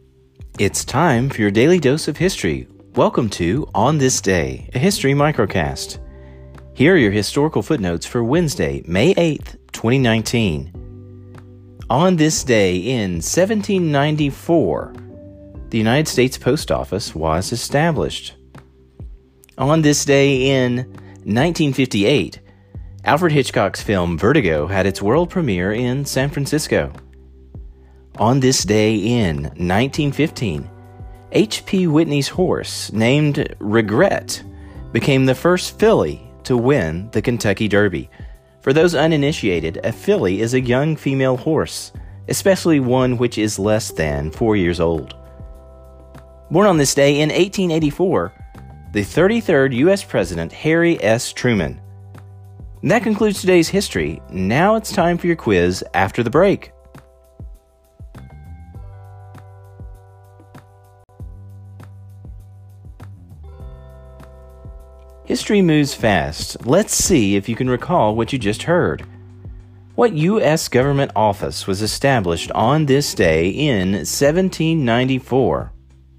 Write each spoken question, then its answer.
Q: What U.S. government office was established on this day in 1794?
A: the United States Post Office.